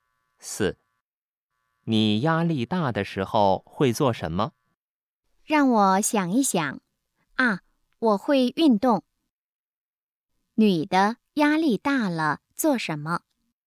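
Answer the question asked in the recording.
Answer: 运动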